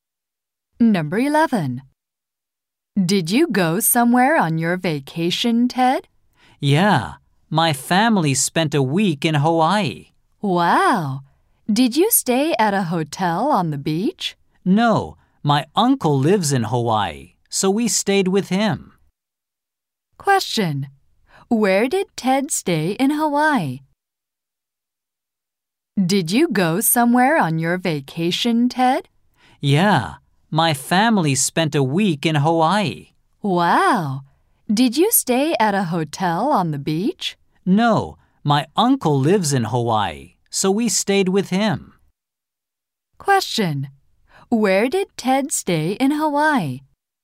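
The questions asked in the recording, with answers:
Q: Question. Where did Ted stay in Hawaii?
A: At his uncle's house.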